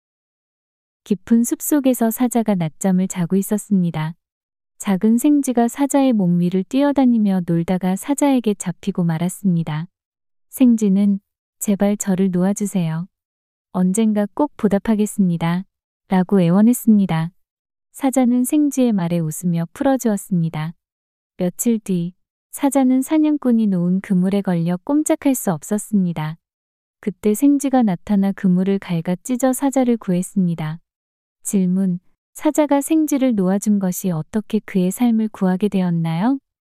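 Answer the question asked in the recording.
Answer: 사자가 사냥꾼의 그물에 걸렸을 때 생쥐가 그물을 갉아 찢어 사자를 구해 주었다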